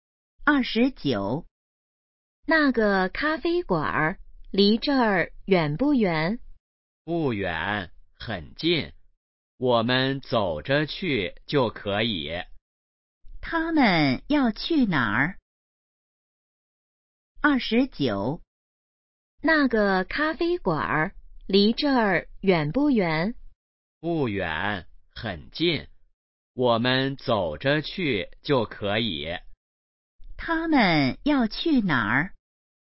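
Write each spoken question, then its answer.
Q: 他们要去哪儿?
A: 咖啡馆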